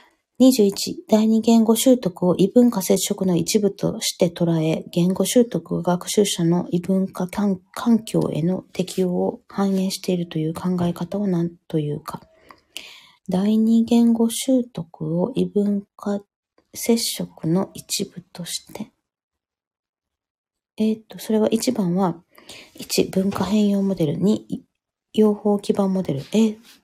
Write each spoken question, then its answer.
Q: 第二言語習得を異文化接触の一部として捉え、言語習得を学習者の異文化環境への適応を反映しているという考え方を何というか。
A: 1、シューマンが提唱した文化変容モデルは第二言語習得のモデルである。